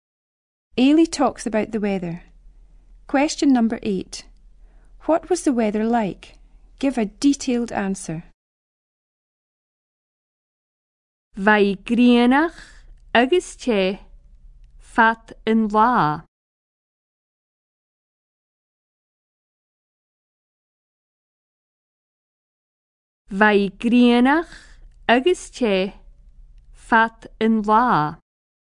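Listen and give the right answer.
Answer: Sunny and hot all day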